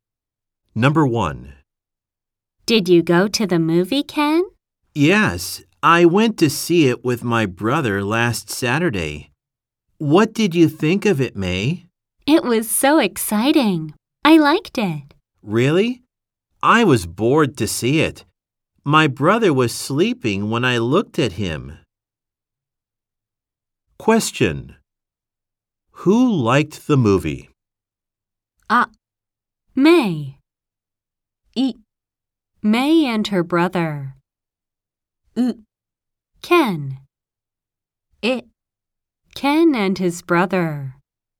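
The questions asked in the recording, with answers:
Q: Who liked the movie?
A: あ: May.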